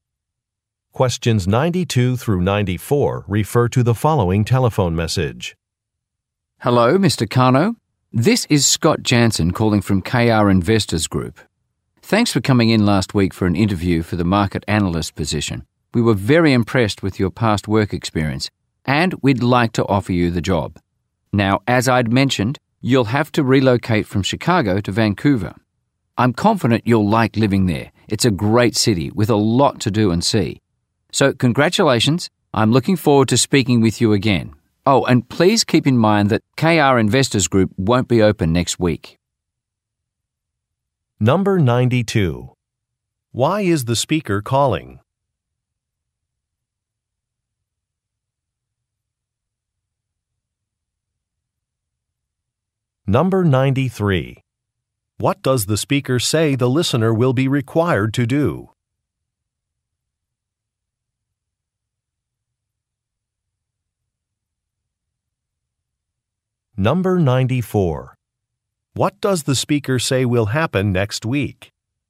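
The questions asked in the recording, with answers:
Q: Why is the speaker calling?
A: To offer the listener a job

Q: What does the speaker say the listener will be required to do?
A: Relocate from Chicago to Vancouver

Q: What does the speaker say will happen next week?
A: The company will be closed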